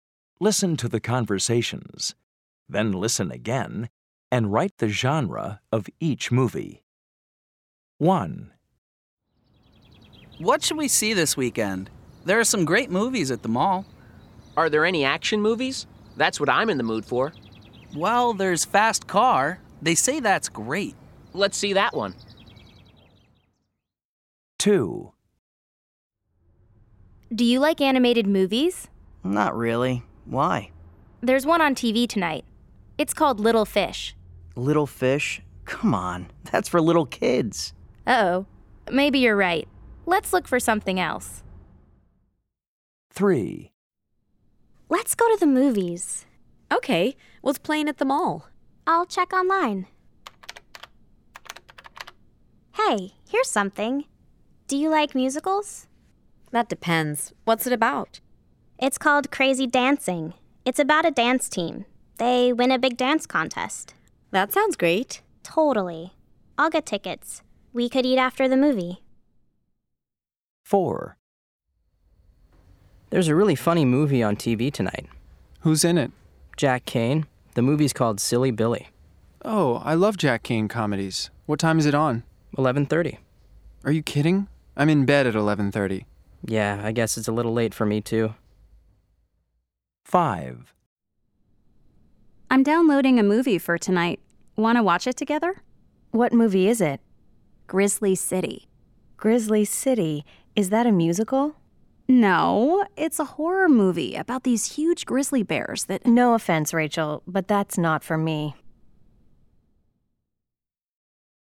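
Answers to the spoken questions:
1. action
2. animated
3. musical
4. comedy
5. horror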